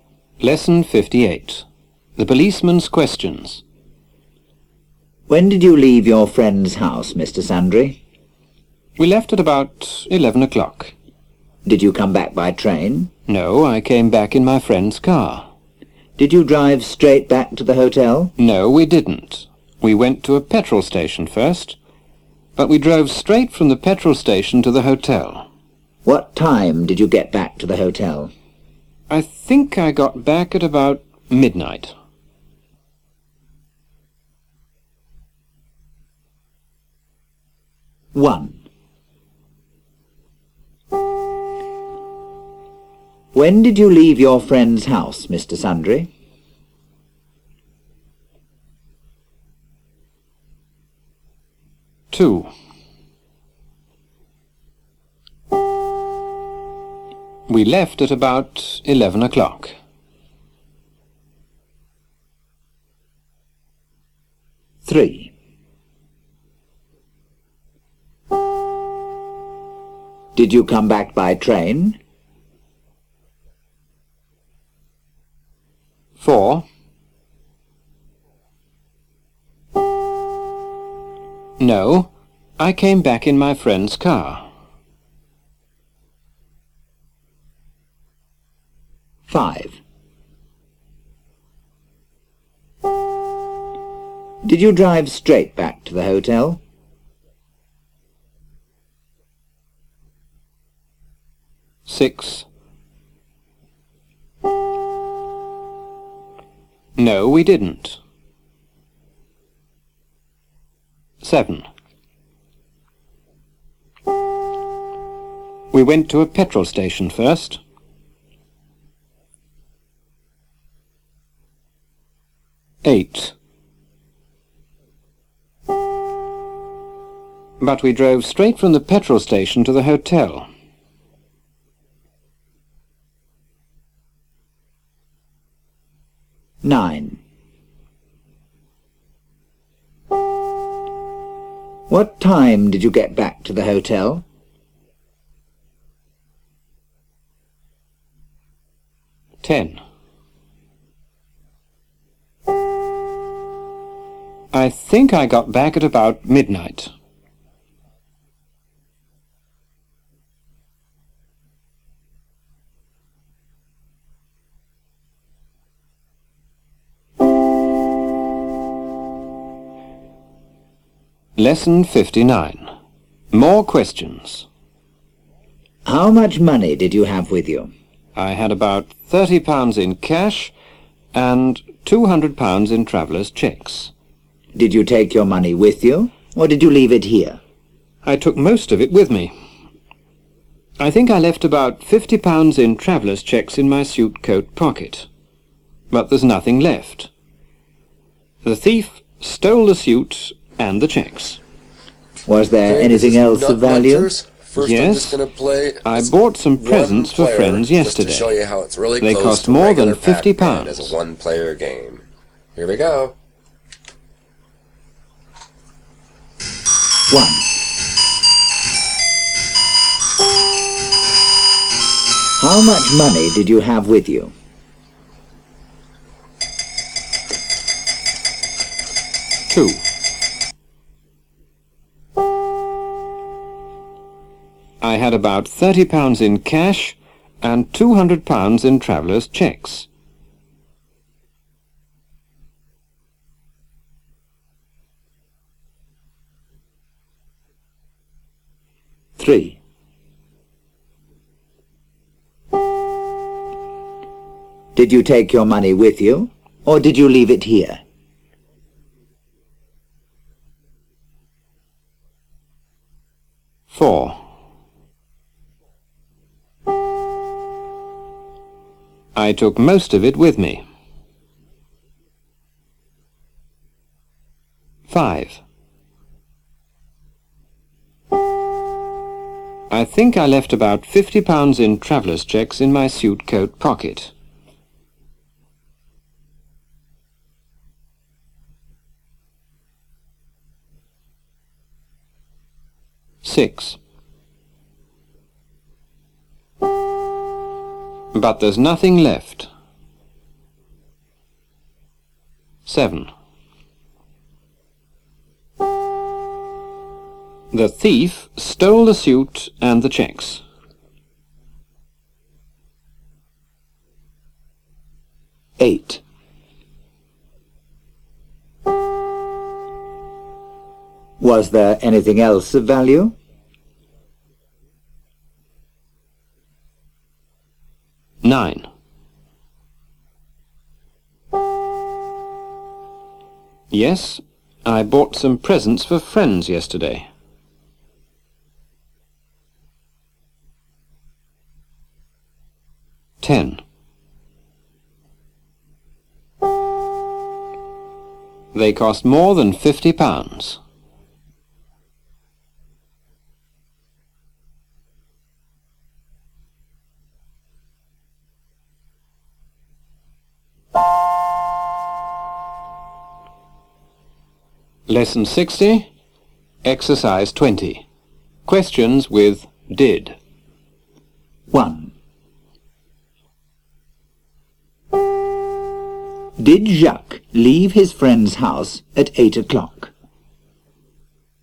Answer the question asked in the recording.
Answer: No, he didn't. He left at 11 o'clock.